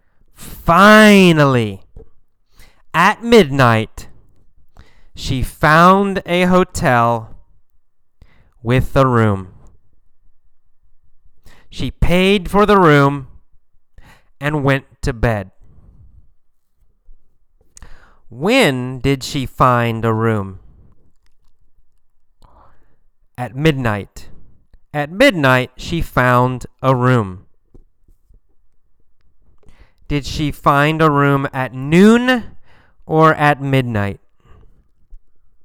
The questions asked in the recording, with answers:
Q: Did she find a room at noon or at midnight?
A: Not at noon. She found a room at midnight.